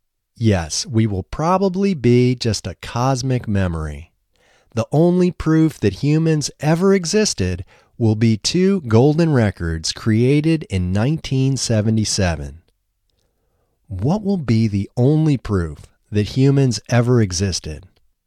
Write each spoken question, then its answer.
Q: What will be the only proof that humans ever existed?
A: The only proof that humans ever existed will be two golden records created in 1977.